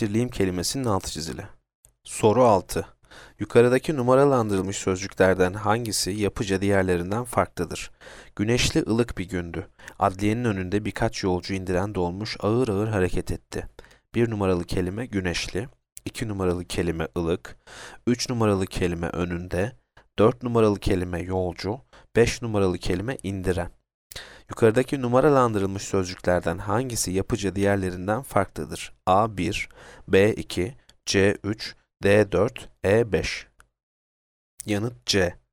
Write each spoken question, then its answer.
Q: Yukarıdaki numaralandırılmış sözcüklerden hangisi yapıca diğerlerinden farklıdır?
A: Yanıt C.